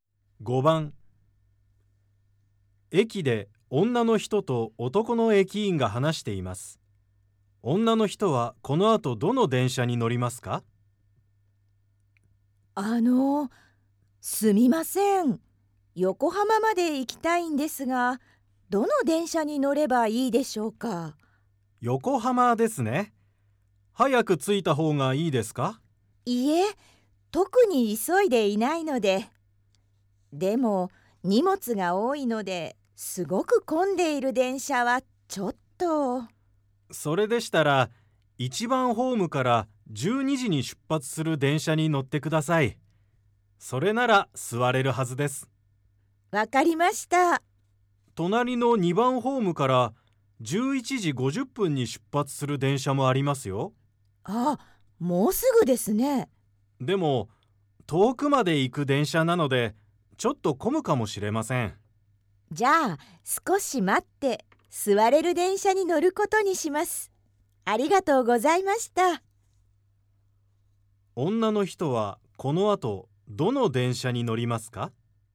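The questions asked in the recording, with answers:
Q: 女の人はこの後どの電車に乗りますか?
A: 1番ホームから12時に出発する電車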